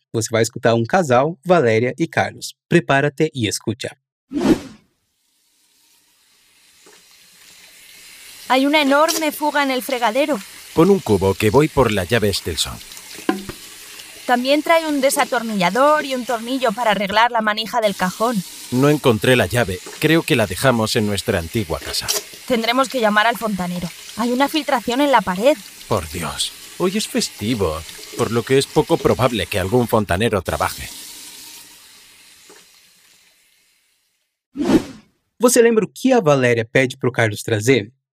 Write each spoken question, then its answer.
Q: Você lembra o que a Valeria pede para Carlos trazer?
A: Um desatornillador e um tornillo